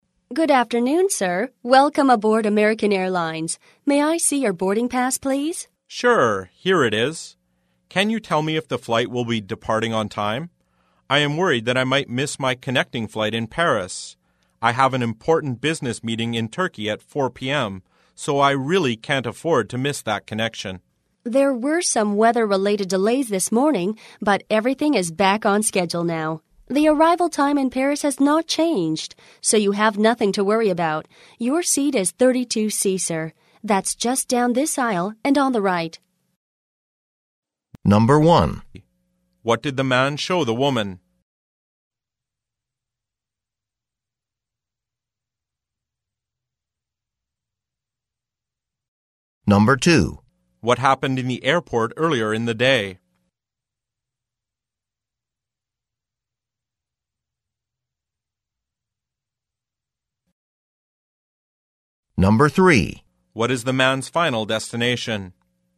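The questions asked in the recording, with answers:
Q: What did the man show the woman?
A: His boarding pass

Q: What happened in the airport earlier in the day?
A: There were weather-related delays

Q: What is the man's final destination?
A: Turkey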